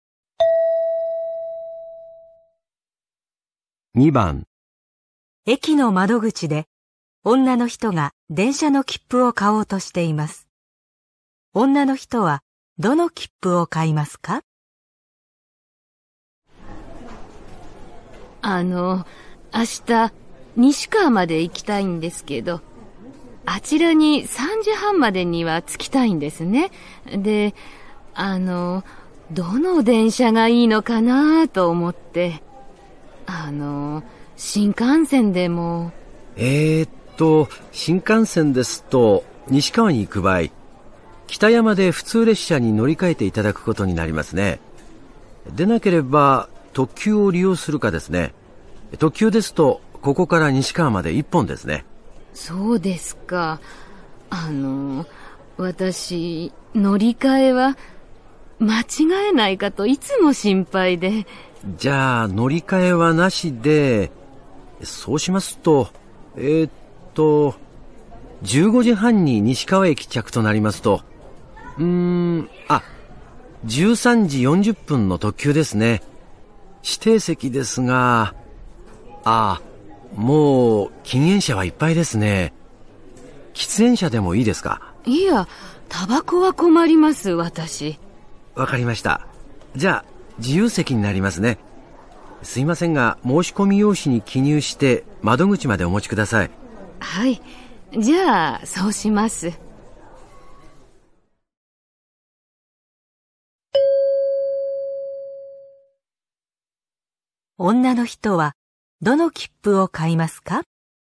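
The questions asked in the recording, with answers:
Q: 女の人はどの切符を買いますか?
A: 13時40分の特急の自由席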